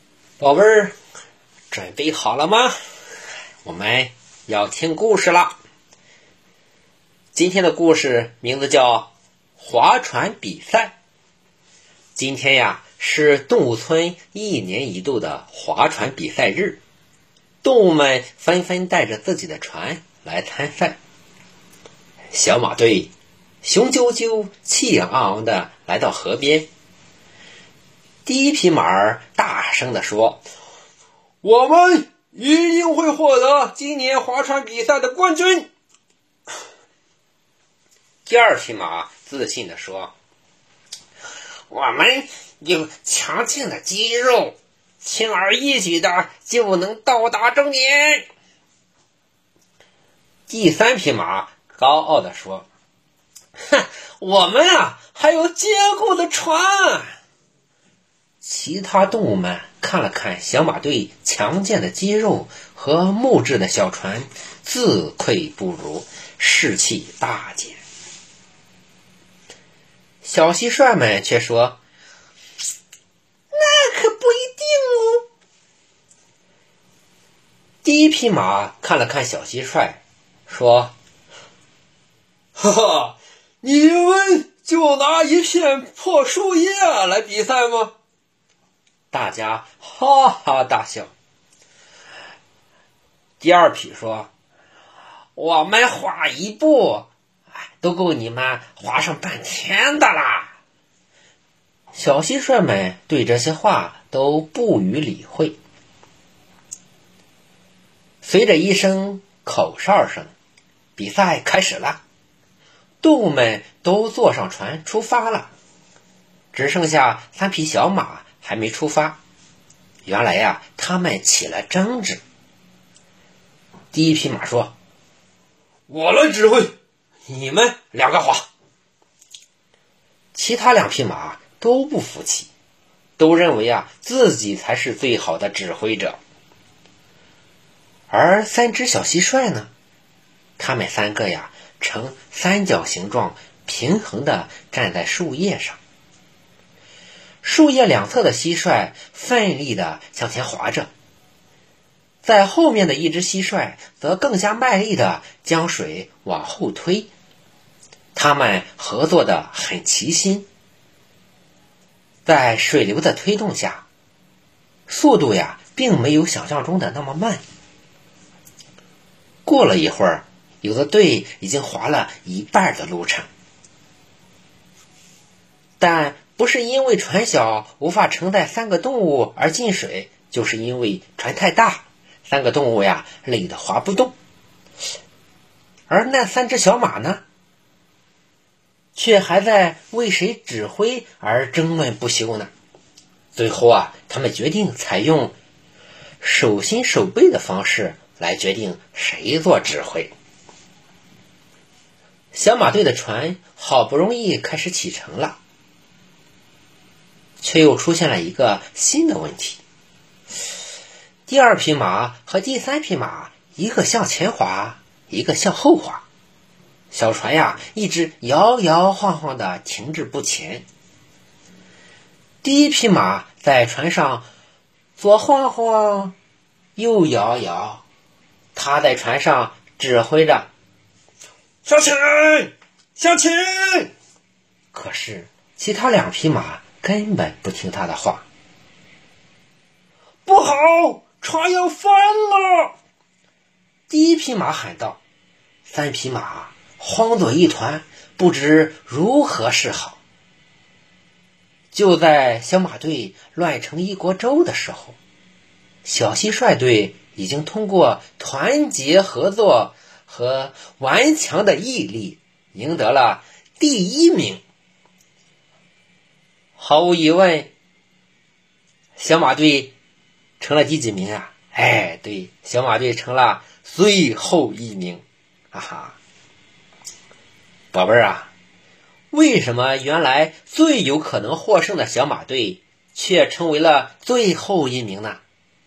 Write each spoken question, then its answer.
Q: 宝贝儿啊,为什么原来最有可能获胜的小马队却成为了最后一名呢?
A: 对,因为他们不团结。